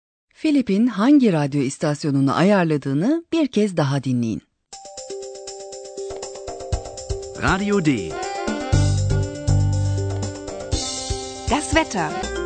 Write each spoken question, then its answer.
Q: Philip'in hangi radyo istasyonunu ayarladığını bir kez daha dinleyin.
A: O kanal Radyo D'ydi